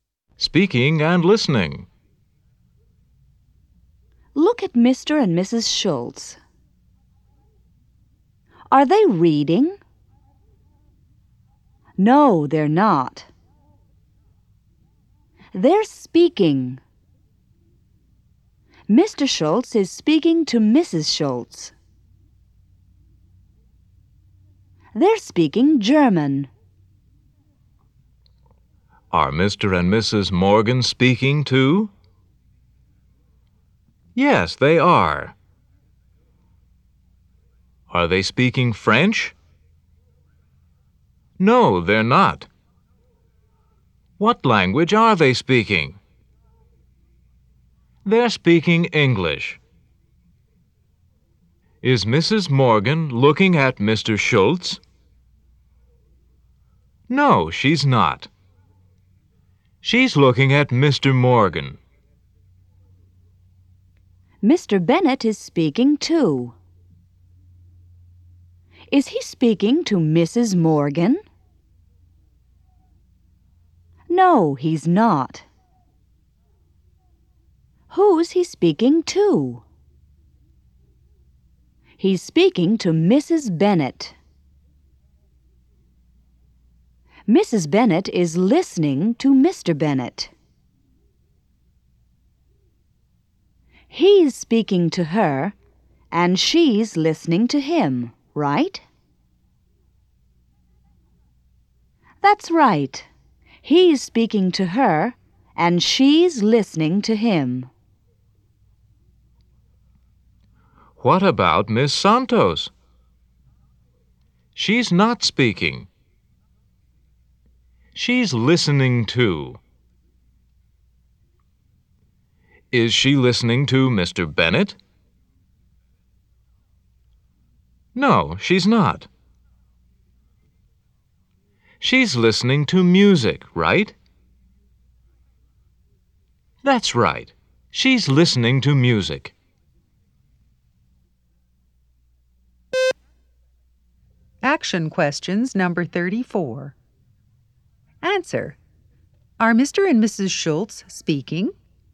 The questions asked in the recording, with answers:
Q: Are Mr. and Mrs. Schultz speaking?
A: Yes, they are.